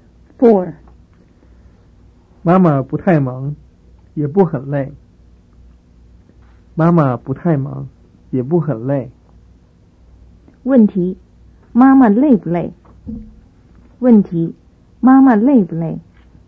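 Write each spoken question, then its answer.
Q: 妈妈累不累?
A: 不很累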